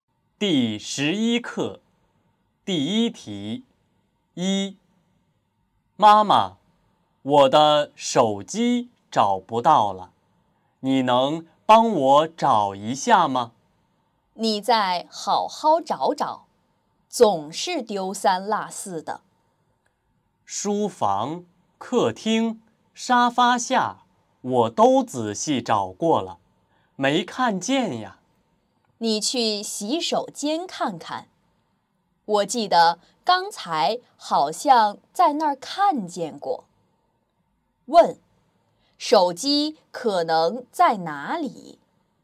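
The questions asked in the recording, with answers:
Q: 问,手机可能在哪里?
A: 洗手间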